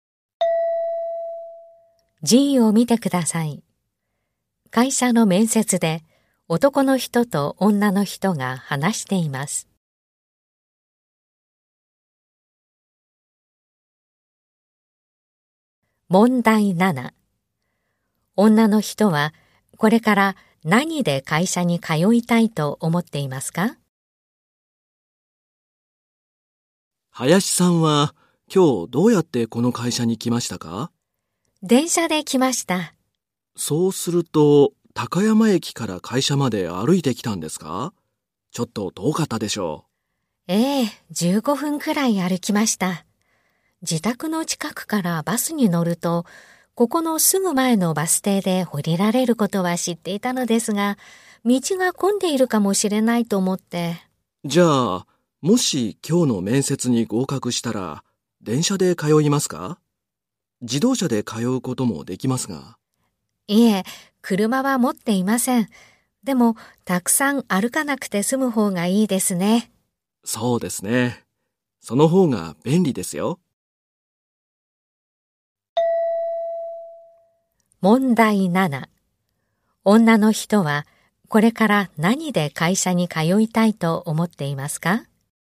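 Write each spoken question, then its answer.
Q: 女の人はこれから何で会社に通いたいと思っていますか?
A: バス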